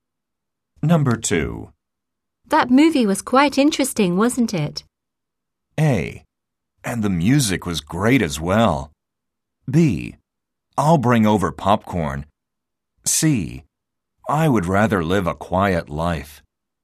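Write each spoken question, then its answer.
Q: That movie was quite interesting, wasn't it?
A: A: And the music was great as well.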